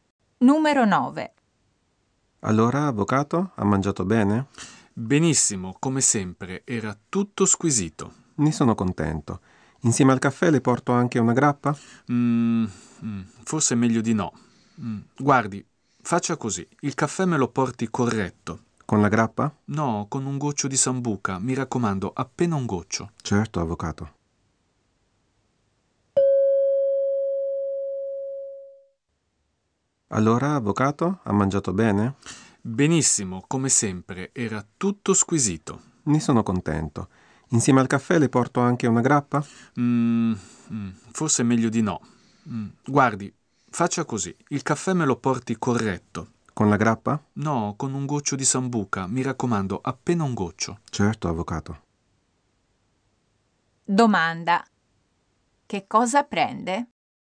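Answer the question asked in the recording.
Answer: Un caffè corretto con un goccio di sambuca.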